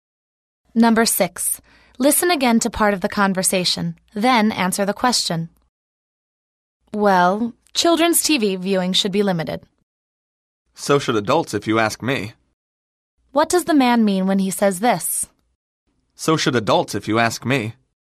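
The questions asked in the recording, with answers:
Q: What does the man mean when he says this?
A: Adults' TV viewing should be limited too.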